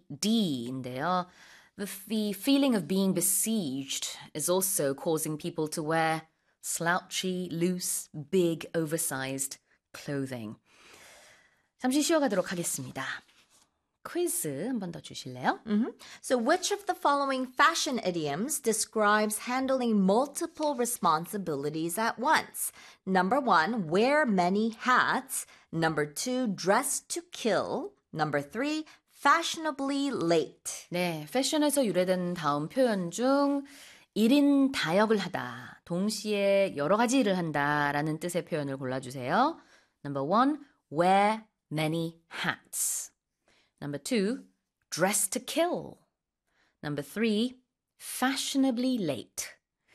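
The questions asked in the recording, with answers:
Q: So, which of the following fashion idioms describes handling multiple responsibilities at once?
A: 1: wear many hats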